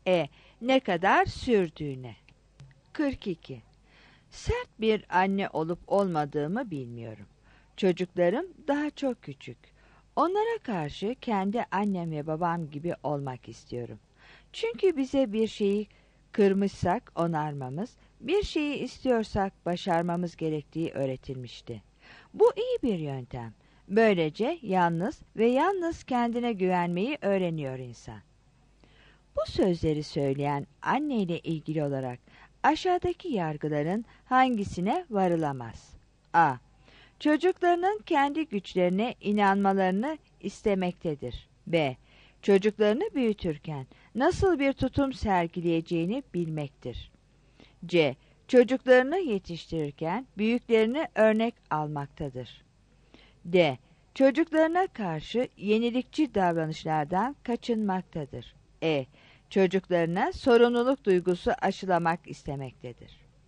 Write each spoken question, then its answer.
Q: Bu sözleri söyleyen anne ile ilgili olarak aşağıdaki yargıların hangisine varılamaz?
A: 42 D